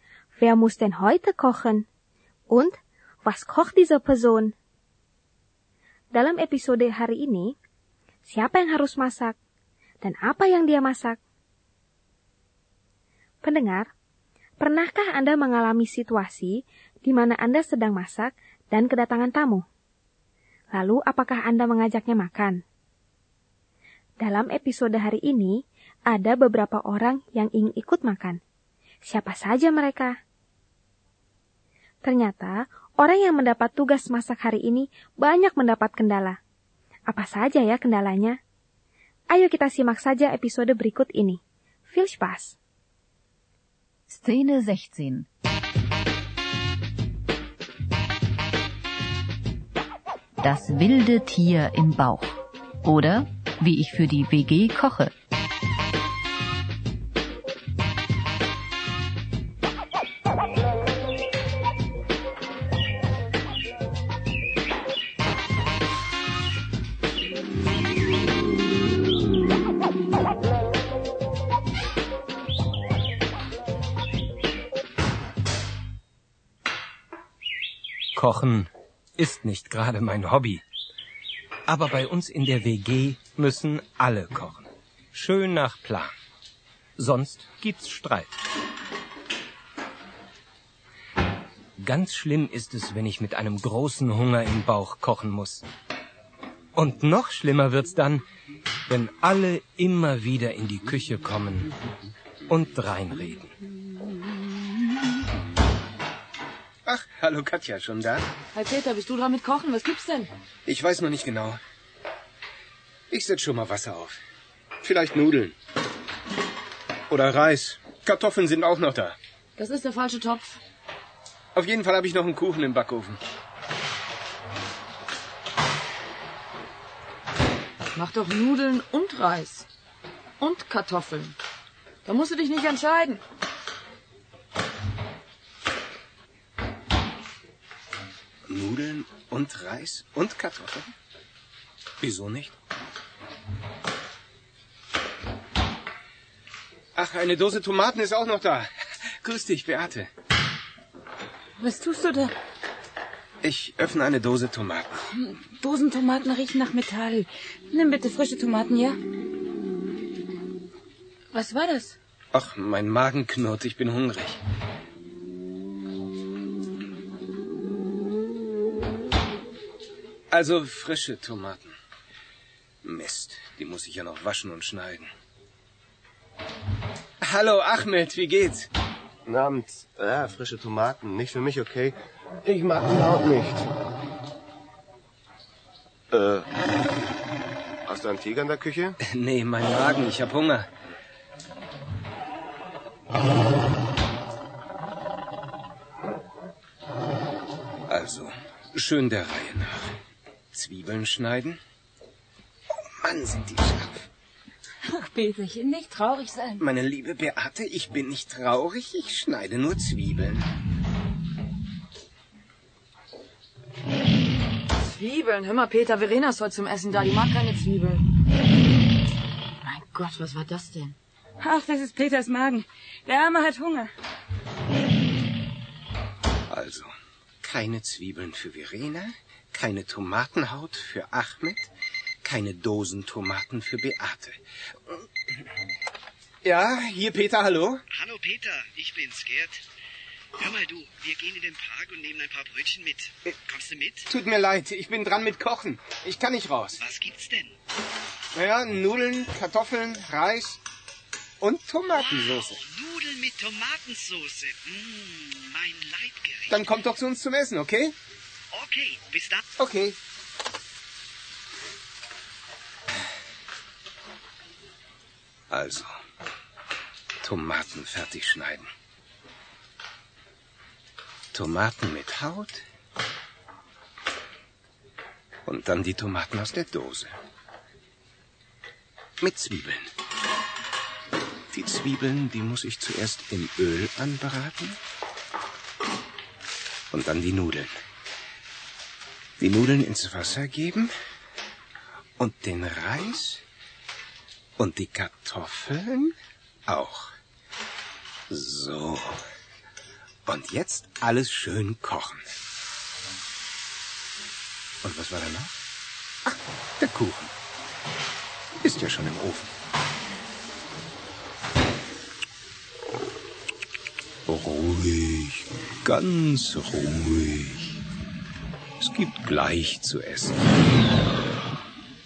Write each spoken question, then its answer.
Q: Wer muss denn heute kochen?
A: Heute muss Peter kochen.

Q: Und Was kocht diese Person?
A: Er kocht Nudeln, Kartoffeln, Reis und Tomatensauce.